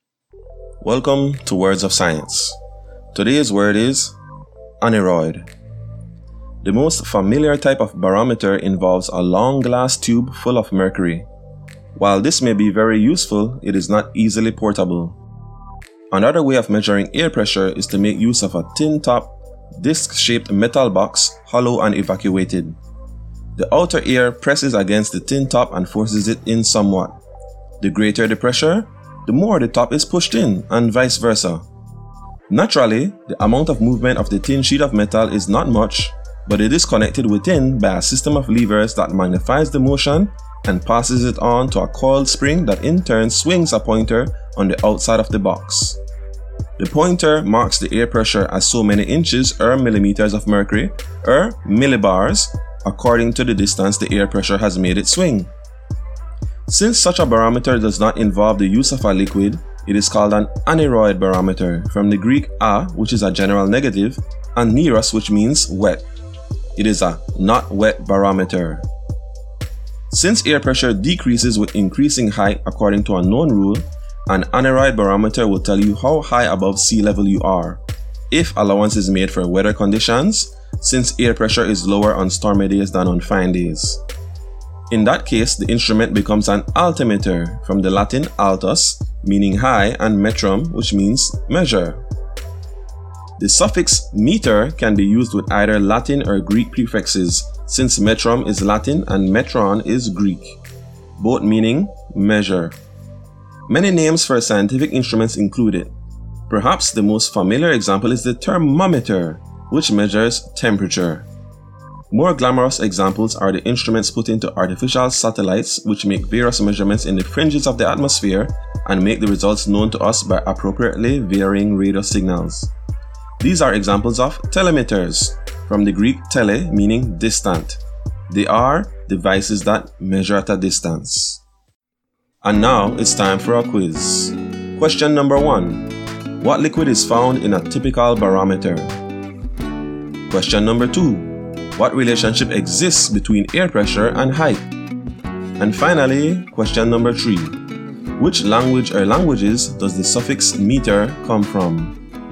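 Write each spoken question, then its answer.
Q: What liquid is found in a typical barometer?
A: Mercury

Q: What relationship exists between air pressure and height?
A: Air pressure decreases as height increases

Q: Which language or languages does the suffix meter come from?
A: Both Latin and Greek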